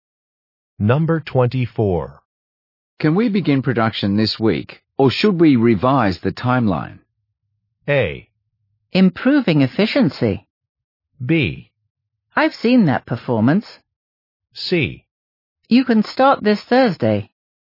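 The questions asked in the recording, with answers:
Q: Can we begin production this week, or should we revise the timeline?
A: C: You can start this Thursday.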